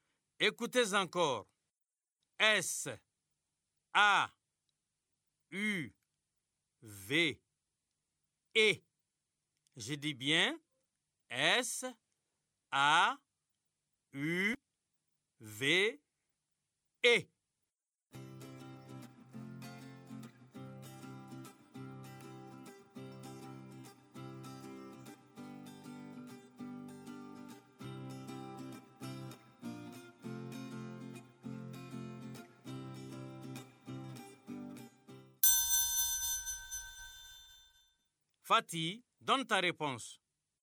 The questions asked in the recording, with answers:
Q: Fatih, donne ta réponse.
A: S, A, U, V, E. C'est sauvé.